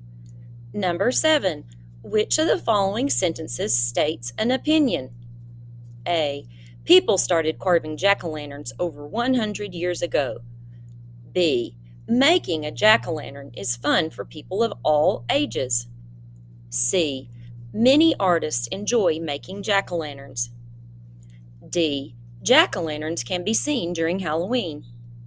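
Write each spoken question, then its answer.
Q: which of the following sentences states an opinion?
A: B: making a jack-o'-lantern is fun for people of all ages.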